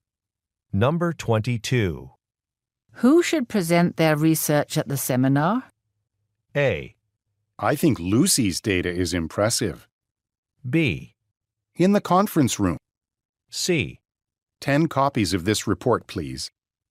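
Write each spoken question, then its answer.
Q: Who should present their research at the seminar?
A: A: I think Lucy's data is impressive.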